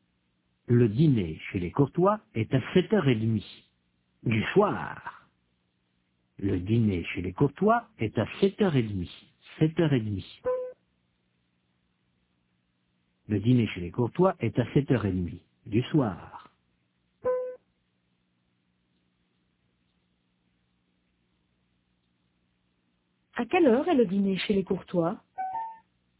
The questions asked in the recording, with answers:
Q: À quelle heure est le dîner chez les Courtois ?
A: À 7h30 du soir.